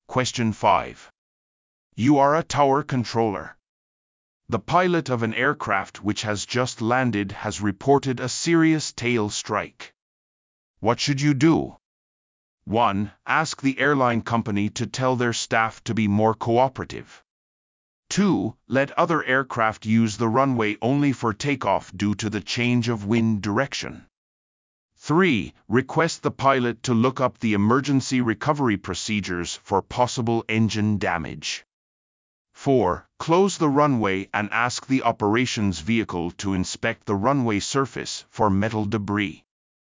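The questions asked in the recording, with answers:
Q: What should you do?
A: 4: Close the runway and ask the operations vehicle to inspect the runway surface for metal debris.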